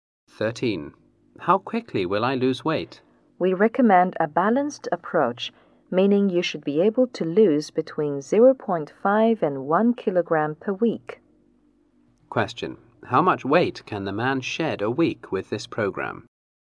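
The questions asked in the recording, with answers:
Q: How much weight can the man shed a week with this program?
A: Between 0.5 and 1 kilogram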